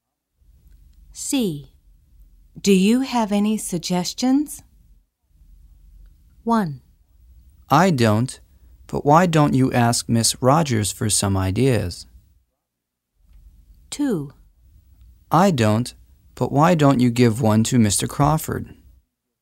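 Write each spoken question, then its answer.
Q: Do you have any suggestions?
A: 1: I don't, but why don't you ask Miss Rogers for some ideas?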